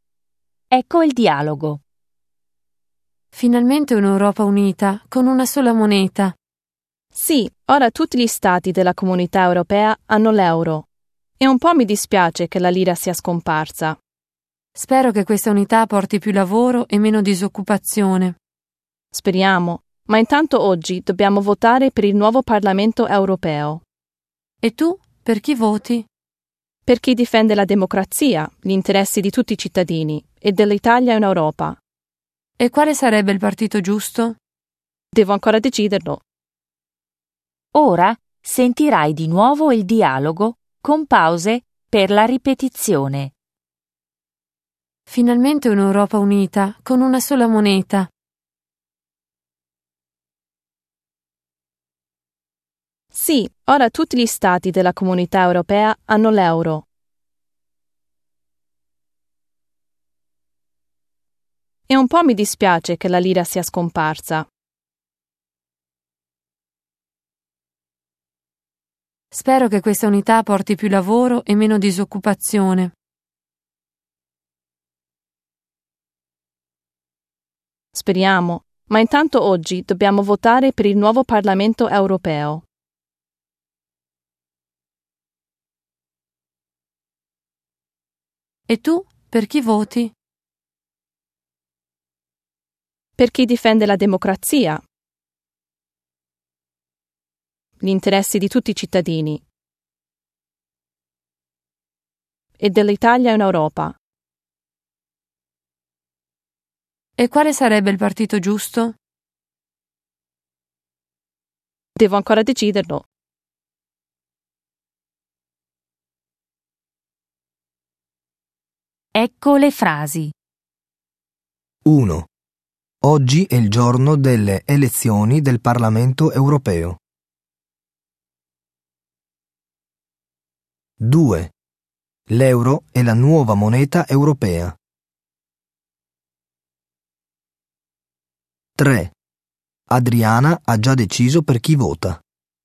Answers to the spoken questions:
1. 1. Vero.
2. 2. Vero.
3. 3. Falso.